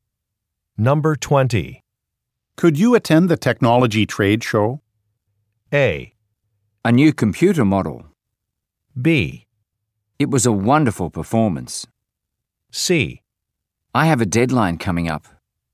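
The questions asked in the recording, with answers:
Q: Could you attend the technology trade show?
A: C: I have a deadline coming up.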